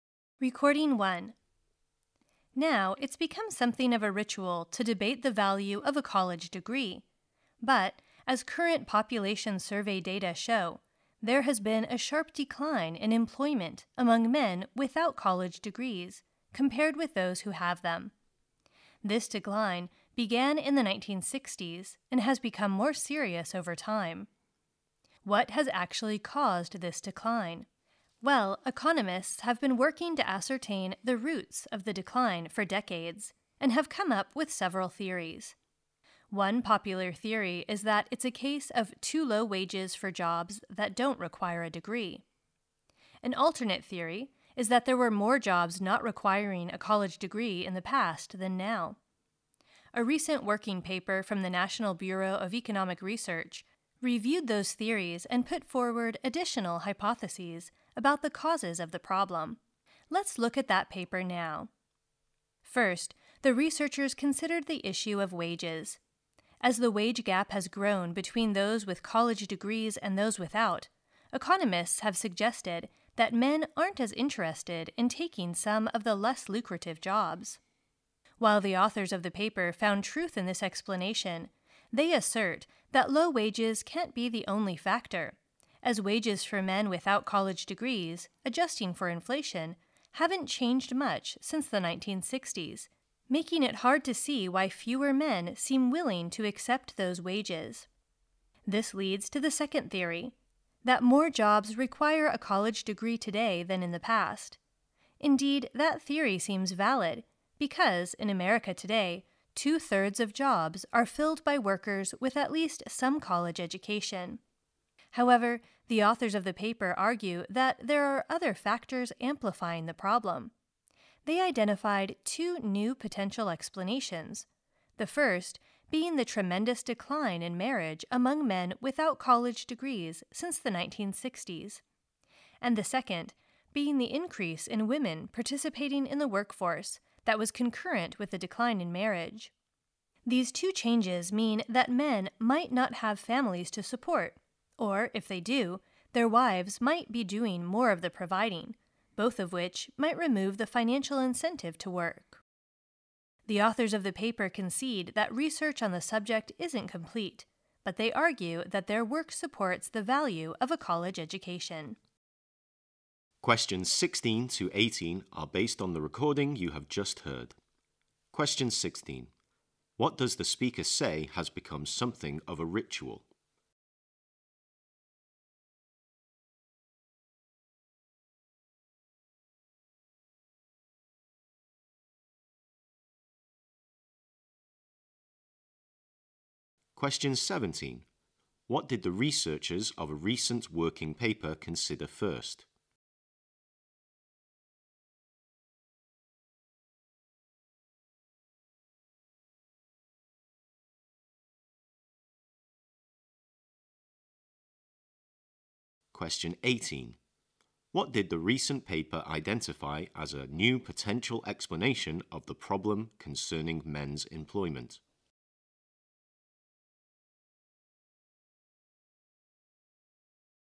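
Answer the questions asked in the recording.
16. Debating the value of a college degree
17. The issue of wages
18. The decline in marriage among men without college degrees (and more women in the workforce)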